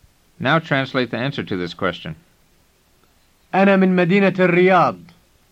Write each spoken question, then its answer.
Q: Now translate the answer to this question.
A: It means I'm from the city of Riyadh.